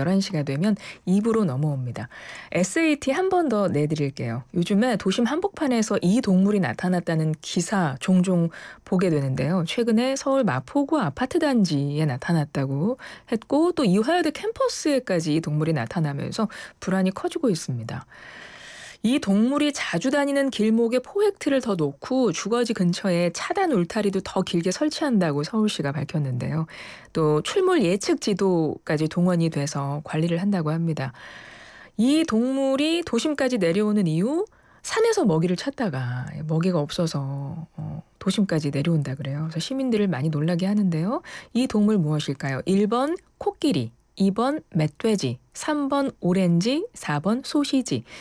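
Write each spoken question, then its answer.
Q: 이 동물 무엇일까요?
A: 2번: 멧돼지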